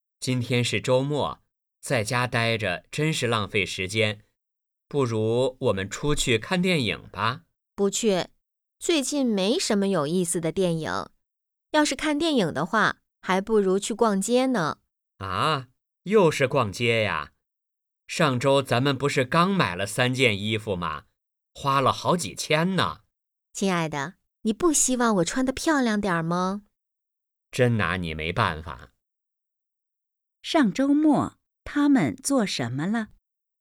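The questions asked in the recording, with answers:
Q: 上周末,他们做什么了?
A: 逛街,买了三件衣服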